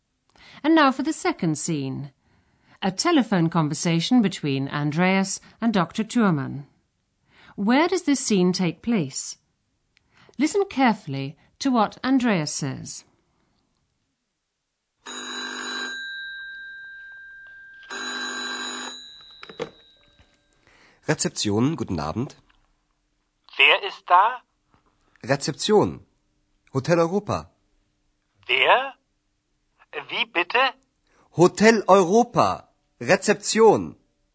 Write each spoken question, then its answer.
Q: Where does this scene take place?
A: Andreas is in a hotel. He picks up the phone and says, Rezeption.